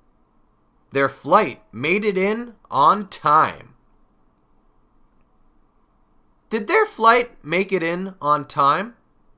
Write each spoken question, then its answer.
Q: Did their flight make it in on time?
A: Yes, it did. Their flight made it in on time.